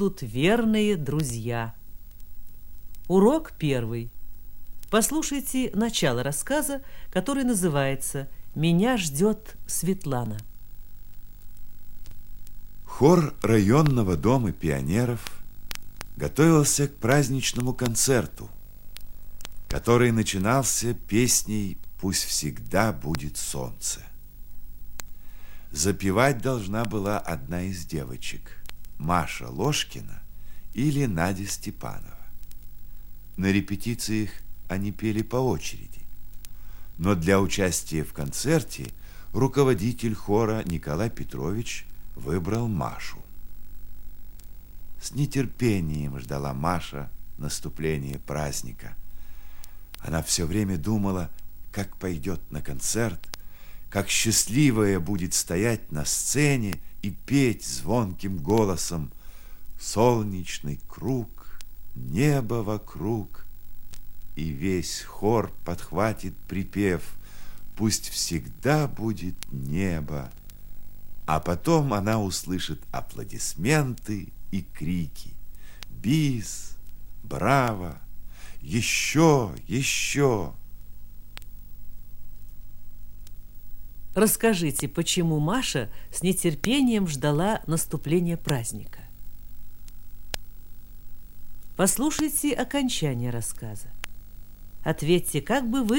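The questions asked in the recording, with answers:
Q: Расскажите, почему Маша с нетерпением ждала наступления праздника?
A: Она должна была запевать песню на концерте и мечтала, как будет петь на сцене и услышит аплодисменты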